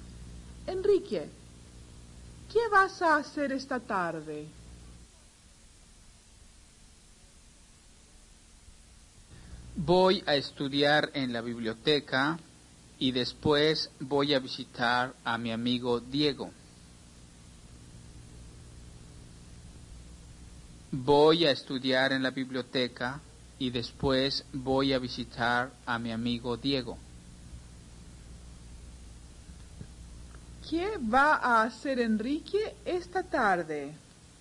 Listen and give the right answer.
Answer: Enrique va a estudiar en la biblioteca y después va a visitar a su amigo Diego.